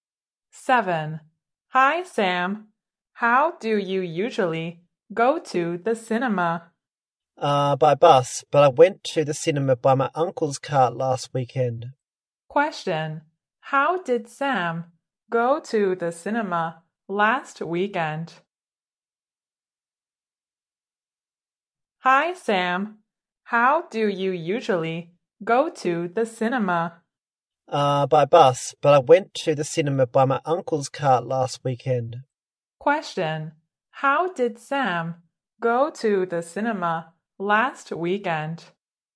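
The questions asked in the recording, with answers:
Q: How did Sam go to the cinema last weekend?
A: By his uncle's car.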